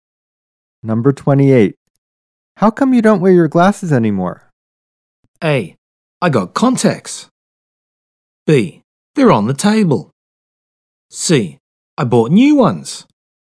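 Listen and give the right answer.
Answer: A: I got contacts.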